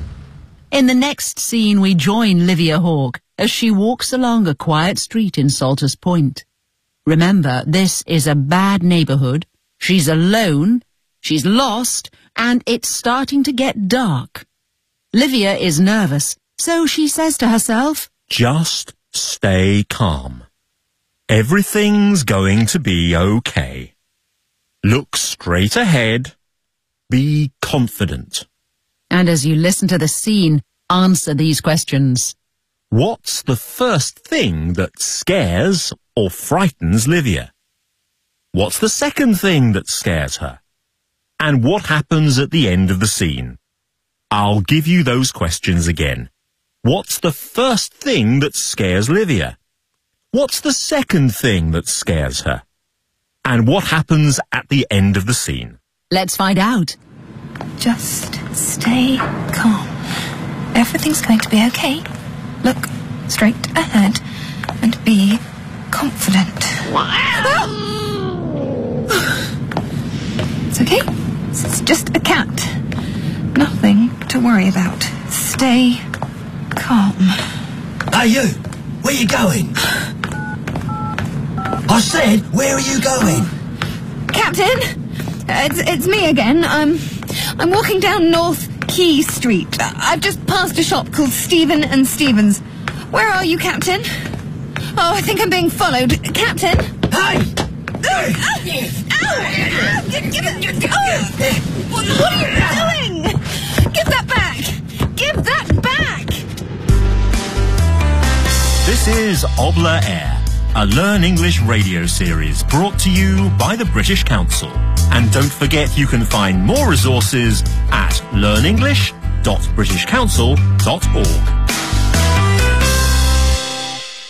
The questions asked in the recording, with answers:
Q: What's the first thing that scares or frightens Livia?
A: It was just a cat.

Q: What's the second thing that scares her?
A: A man called to her.